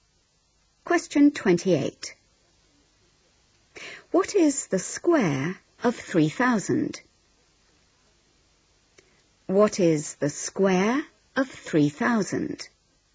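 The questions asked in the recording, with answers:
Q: What is the square of 3,000?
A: 9,000,000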